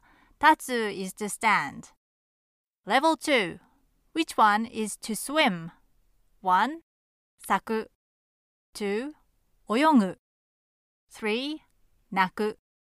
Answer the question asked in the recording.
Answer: Number two, oyogu is the answer.